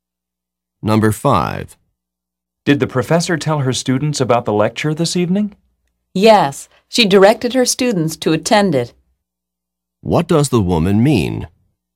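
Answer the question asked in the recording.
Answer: The professor told her students to attend the lecture.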